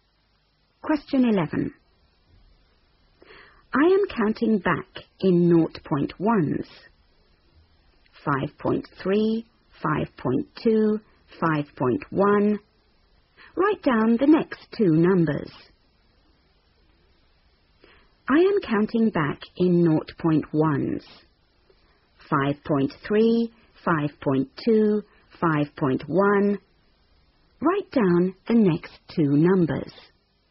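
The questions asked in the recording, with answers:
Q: Write down the next two numbers.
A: 5.0, 4.9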